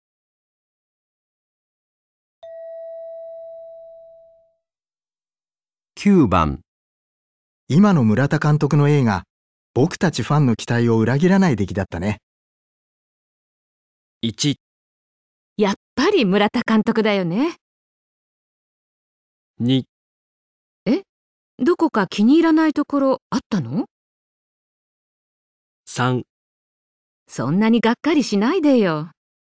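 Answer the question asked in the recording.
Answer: やっぱり村田監督だよね

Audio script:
3. そんなにがっかりしないでよ

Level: N1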